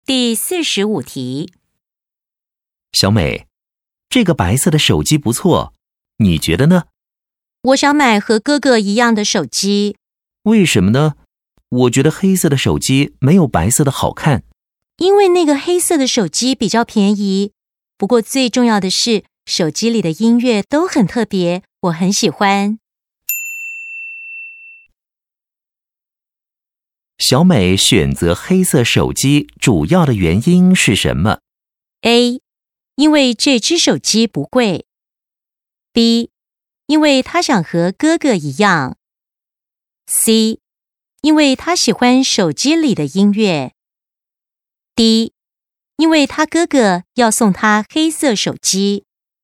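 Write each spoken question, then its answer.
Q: 小美选择黑色手机主要的原因是什么?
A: C: 因为她喜欢手机里的音乐。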